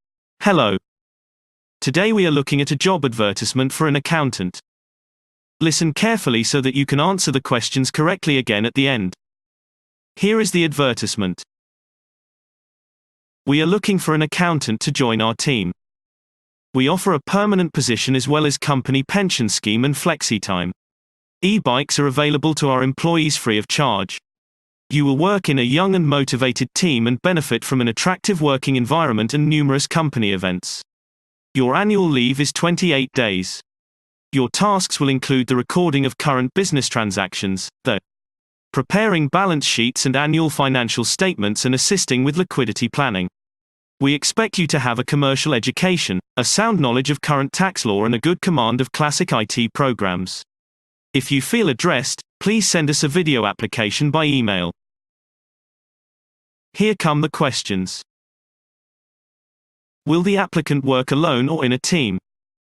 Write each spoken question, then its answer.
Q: Will the applicant work alone or in a team?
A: Response. The applicant will work in a team.